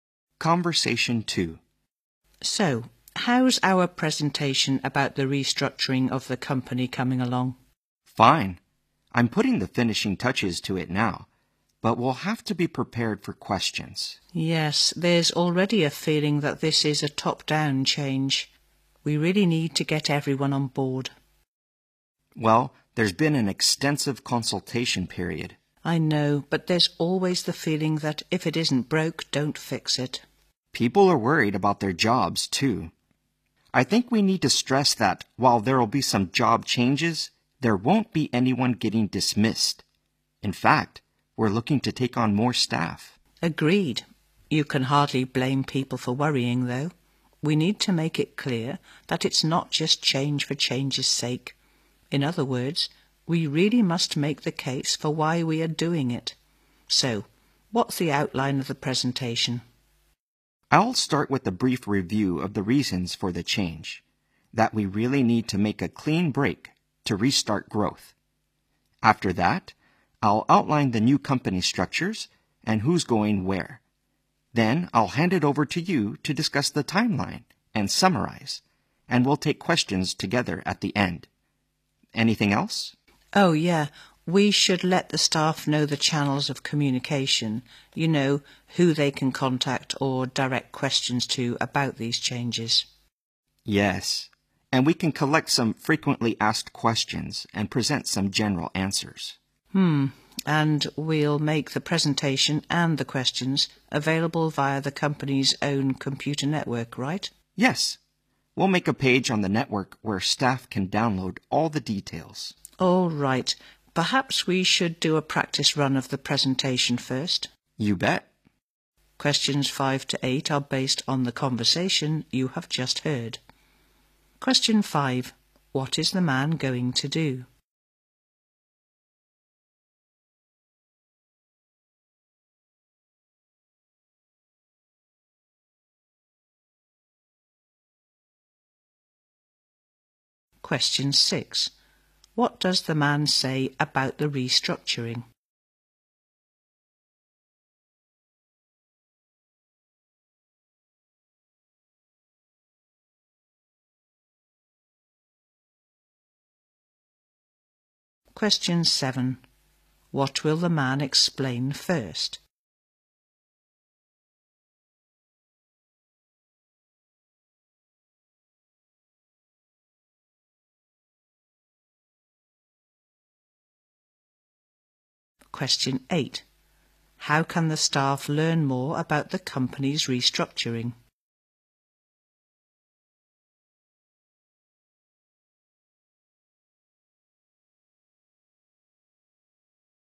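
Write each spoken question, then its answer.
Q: What is the man going to do?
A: Give a presentation about restructuring the company

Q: What does the man say about the restructuring?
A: No one will be dismissed; they plan to take on more staff

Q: What will the man explain first?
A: The reasons for the change

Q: How can the staff learn more about the company's restructuring?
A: By downloading details from a page on the company's computer network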